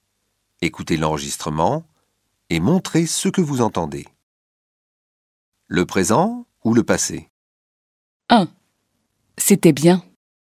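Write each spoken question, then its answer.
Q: Le présent ou le passé?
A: le passé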